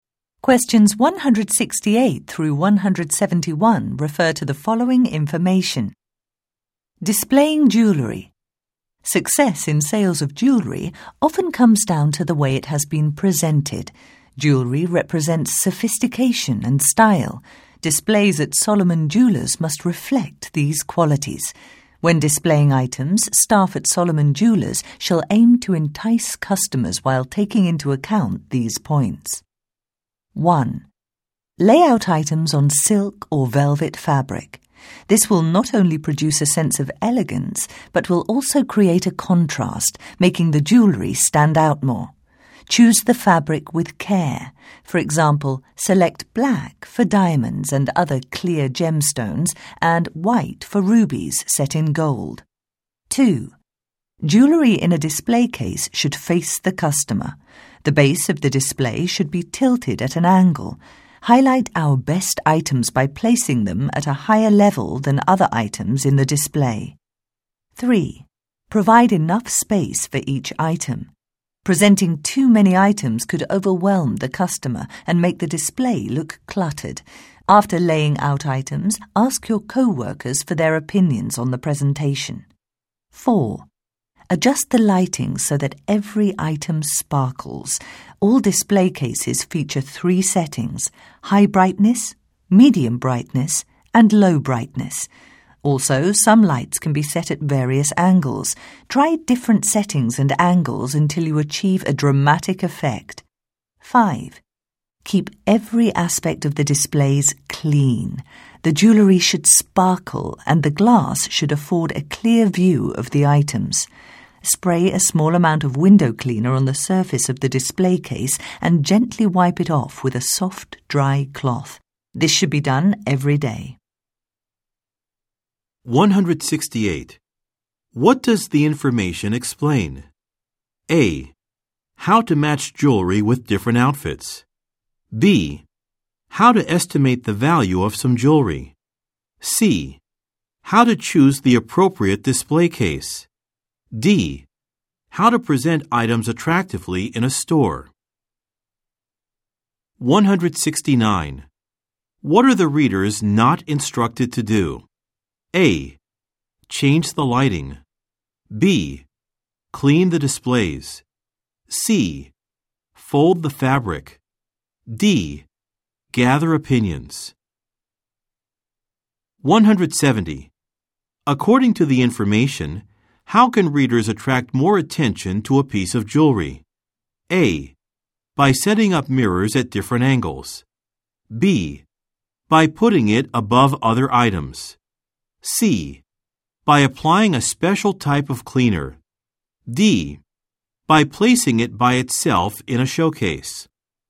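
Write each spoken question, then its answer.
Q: What does the information explain?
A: D: How to present items attractively in a store.

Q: What are the readers not instructed to do?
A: C: Fold the fabric.

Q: According to the information, how can readers attract more attention to a piece of jewelry?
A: B: By putting it above other items.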